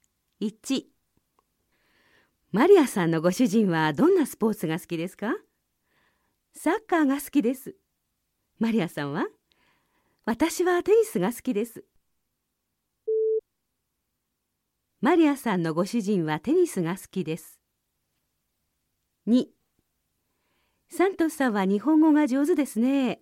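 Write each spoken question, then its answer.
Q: マリアさんのご主人はテニスが好きです。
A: いいえ(サッカーが好きです)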